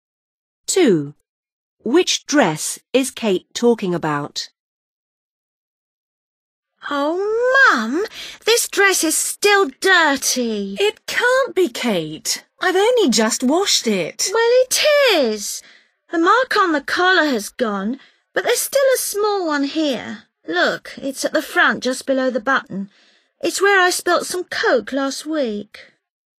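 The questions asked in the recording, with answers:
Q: Which dress is Kate talking about?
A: the one with a small mark at the front, just below the button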